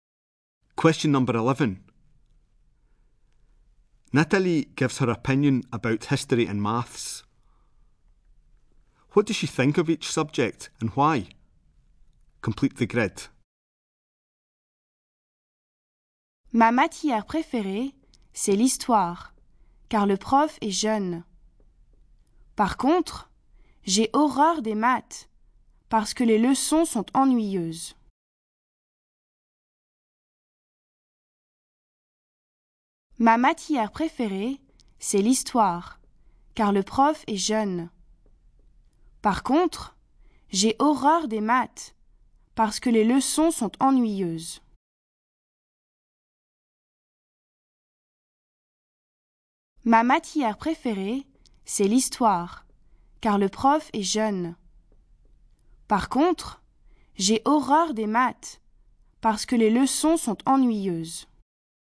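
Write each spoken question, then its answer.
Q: What does she think of each subject and why?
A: History is her favourite because the teacher is young; she hates maths because the lessons are boring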